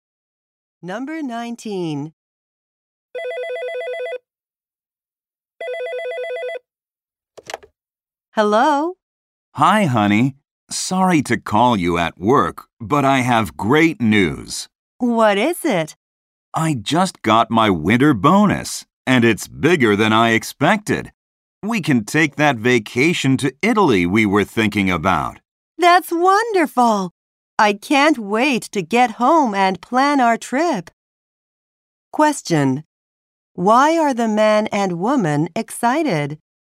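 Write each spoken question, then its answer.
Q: Why are the man and woman excited?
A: They can take a vacation to Italy because of his big bonus.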